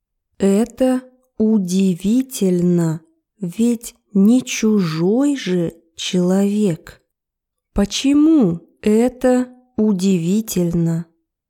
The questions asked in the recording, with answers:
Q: Почему это удивительно?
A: Потому что она не чужой человек.